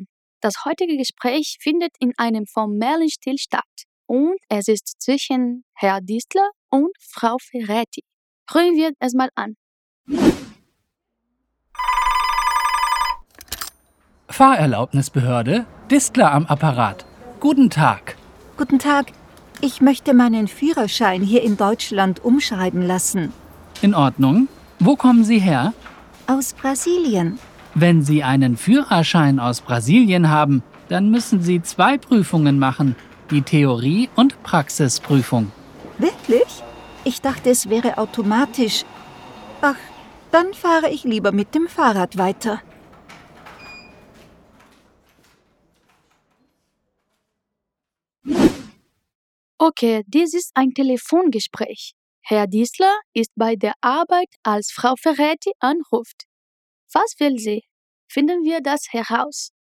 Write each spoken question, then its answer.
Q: Was will sie?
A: Guten Tag, ich möchte meinen Führerschein hier in Deutschland umschreiben lassen.